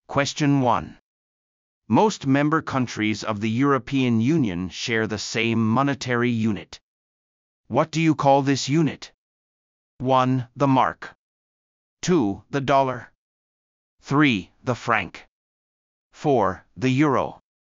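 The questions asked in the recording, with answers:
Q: What do you call this unit?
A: 4: The euro.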